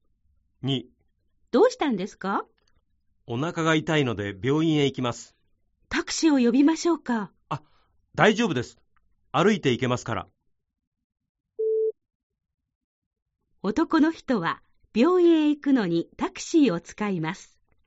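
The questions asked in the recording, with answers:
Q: 男の人は病院へ行くのにタクシーを使います。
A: ×(歩いて行く)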